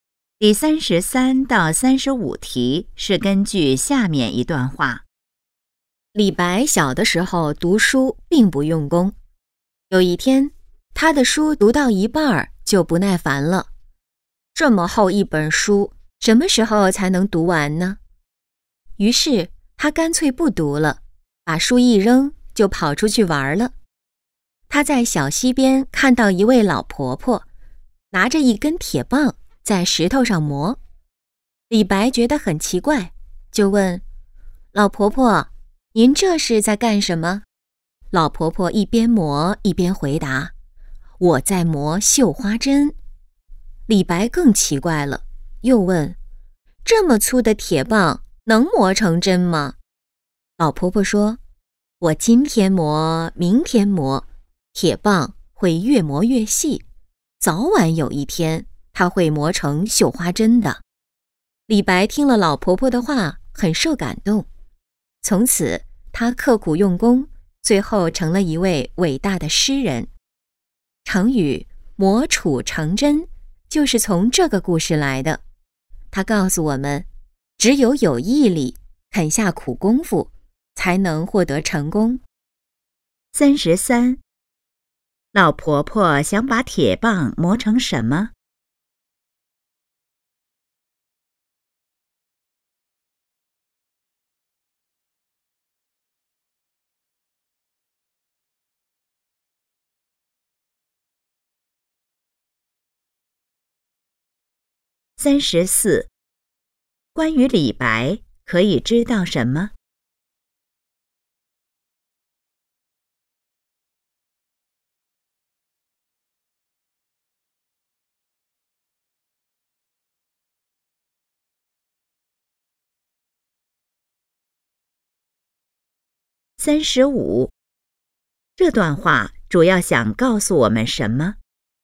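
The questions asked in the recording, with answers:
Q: 老婆婆想把铁棒磨成什么?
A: 绣花针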